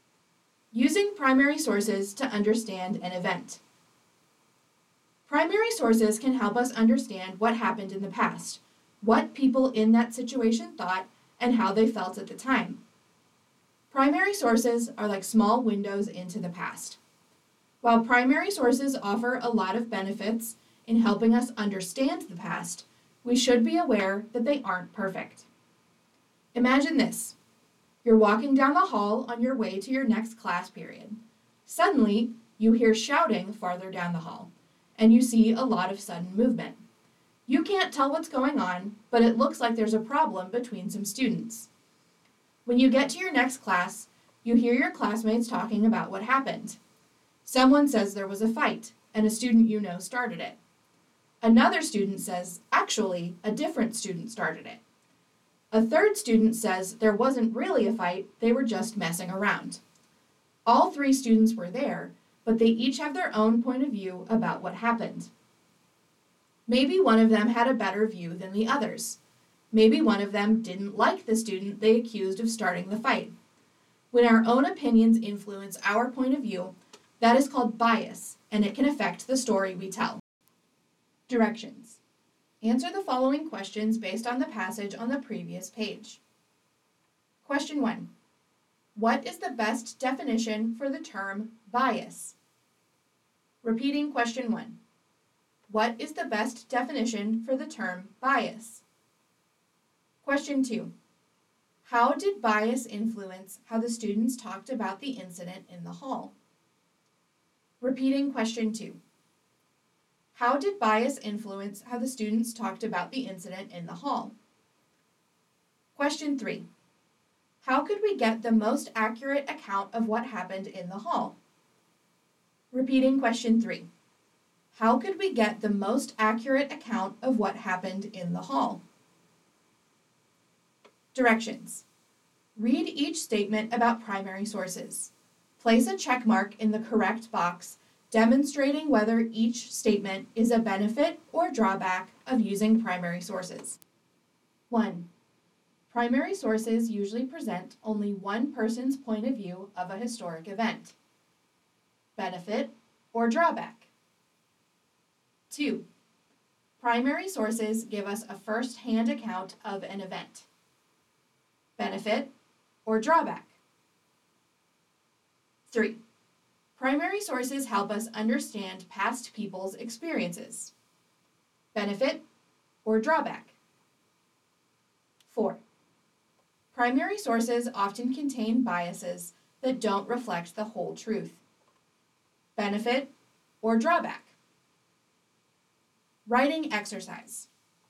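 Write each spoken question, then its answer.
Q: What is the best definition for the term bias?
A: When our own opinions influence our point of view

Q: How did bias influence how the students talked about the incident in the hall?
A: Each student's own opinions and point of view shaped the story they told, so their accounts differed

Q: Primary sources usually present only one person's point of view of a historic event.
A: Drawback

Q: Primary sources give us a first-hand account of an event.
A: Benefit

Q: Primary sources help us understand past people's experiences.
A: Benefit

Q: Primary sources often contain biases that don't reflect the whole truth.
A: Drawback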